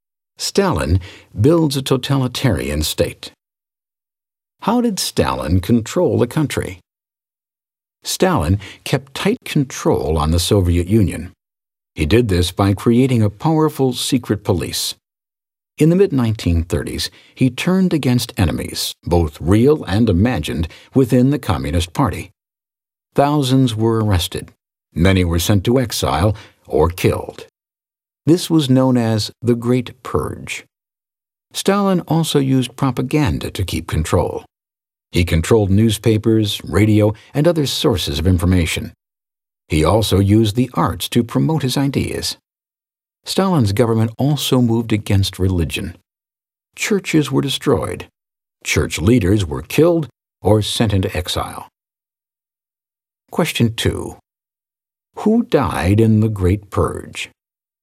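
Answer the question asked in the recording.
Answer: Thousands of Stalin's enemies, real and imagined, within the Communist Party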